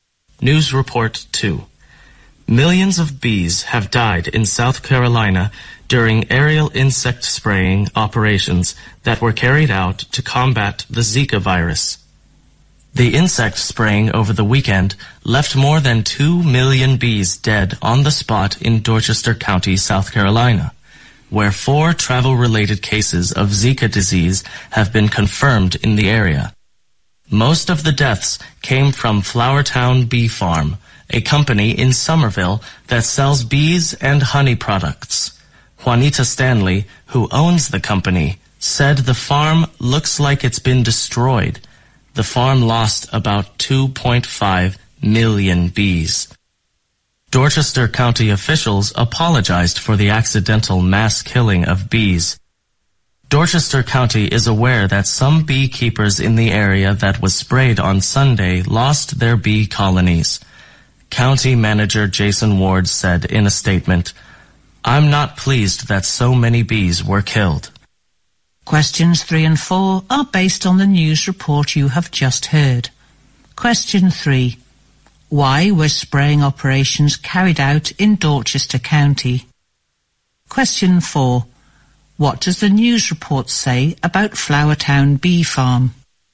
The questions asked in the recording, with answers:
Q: Why were spraying operations carried out in Dorchester County?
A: The purpose of the spraying operations were to combat the Zika virus.

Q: What does the news report say about Flower Town Bee Farm?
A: The owner of the bee farm thinks that it looks like it has been destroyed.